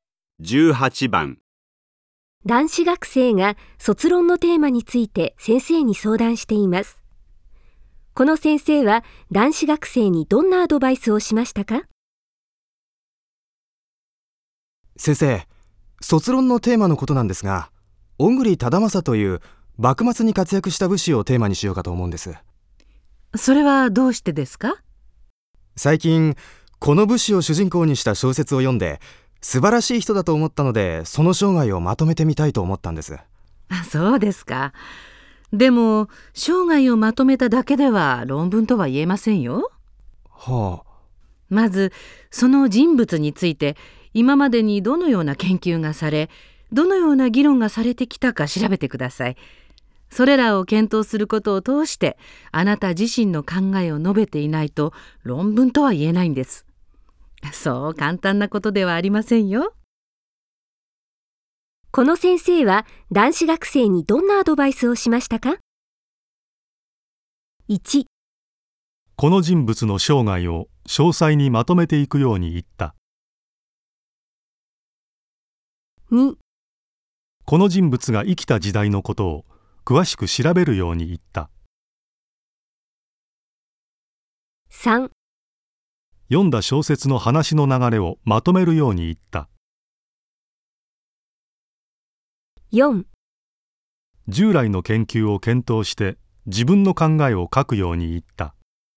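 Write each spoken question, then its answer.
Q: この先生は男子学生にどんなアドバイスをしましたか?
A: 4: 従来の研究を検討して自分の考えを書くように言った。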